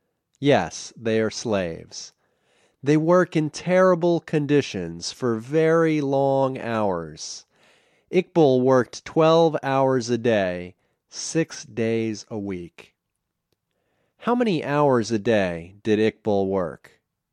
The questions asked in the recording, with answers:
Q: How many hours a day did Iqbal work?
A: He worked 12 hours a day.